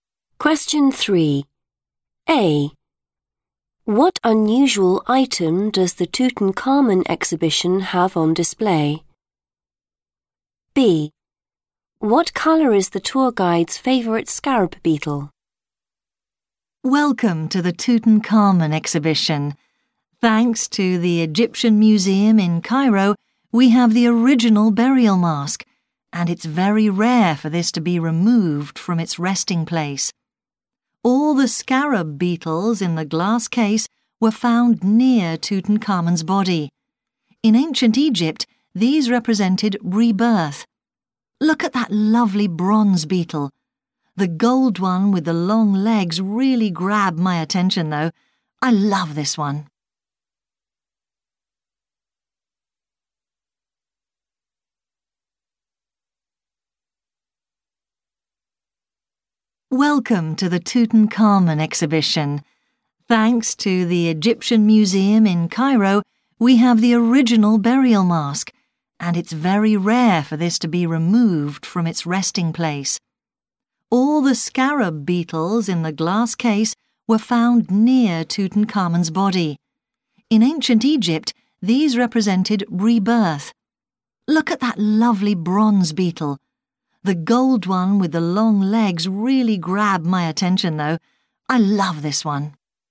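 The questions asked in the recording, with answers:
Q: What unusual item does the Tutankhamun exhibition have on display?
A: the original burial mask

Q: What colour is the tour guide's favourite scarab beetle?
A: gold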